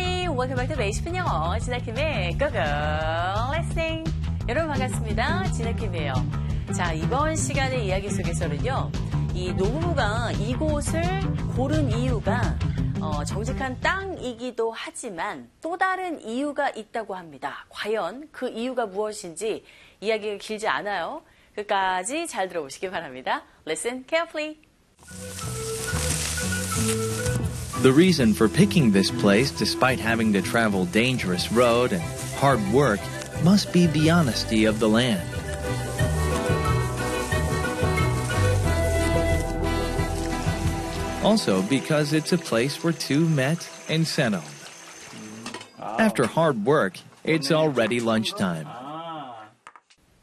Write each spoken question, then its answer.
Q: 과연 그 이유가 무엇인지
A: 바로 두 사람이 만나고 정착한 곳이기 때문에 라는 이유가 들리셨겠죠?